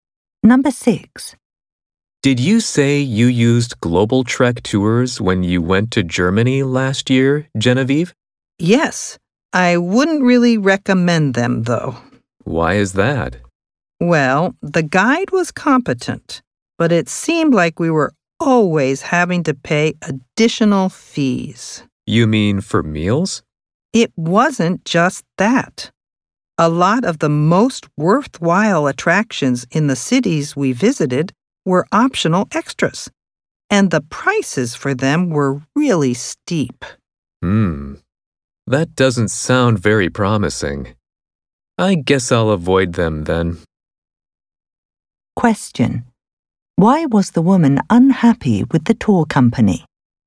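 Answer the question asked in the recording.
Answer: She kept having to pay extra fees, and many of the best attractions were expensive optional extras.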